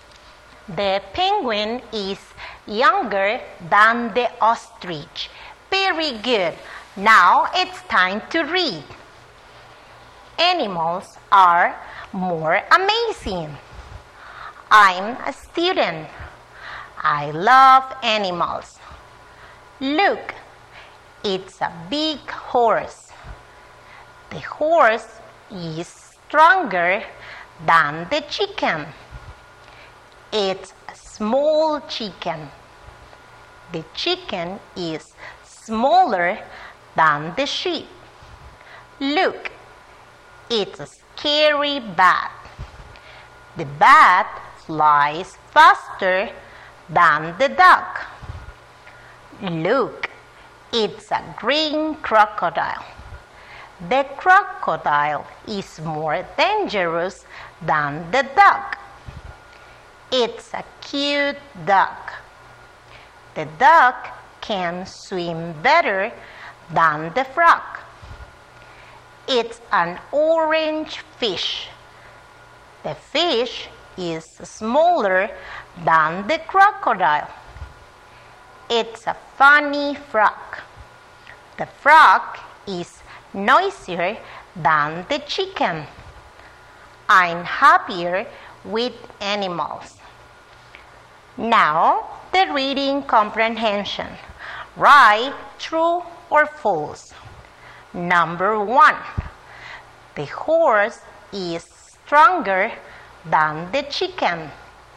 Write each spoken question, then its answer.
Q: Number one, the horse is stronger than the chicken.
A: Very good is true.